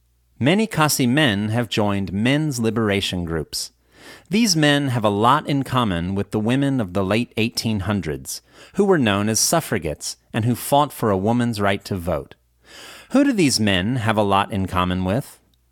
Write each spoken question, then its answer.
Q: Who do these men have a lot in common with?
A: These men have a lot in common with certain women of the late 1800s, who were known as suffragettes and who fought for a woman's right to vote.